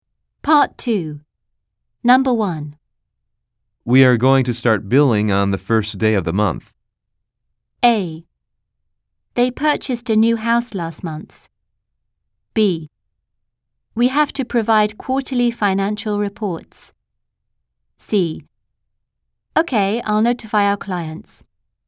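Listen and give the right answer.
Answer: C: Okay, I'll notify our clients.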